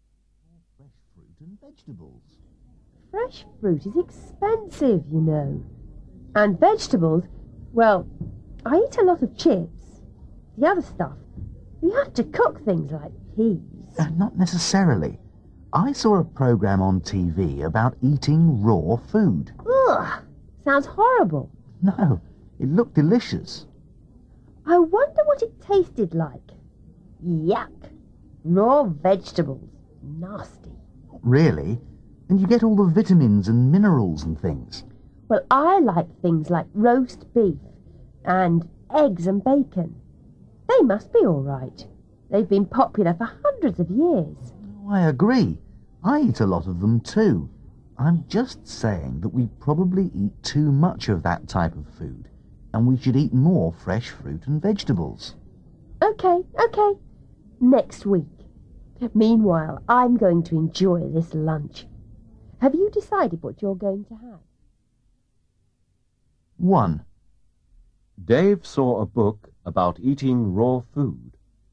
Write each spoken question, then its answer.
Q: Dave saw a book about eating raw food.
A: No, Dave saw a TV program about eating raw food.